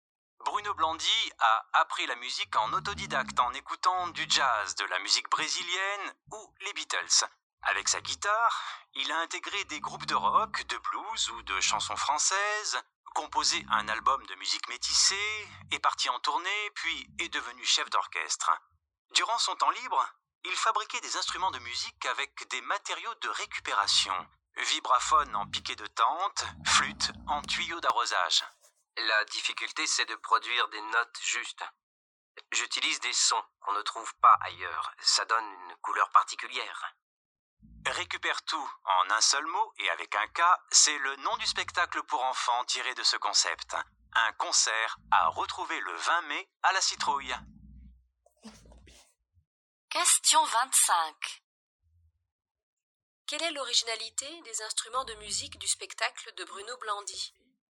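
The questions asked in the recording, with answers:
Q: Quelle est l'originalité des instruments de musique du spectacle de Bruno Blandy ?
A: Ils sont fabriqués avec des matériaux de récupération.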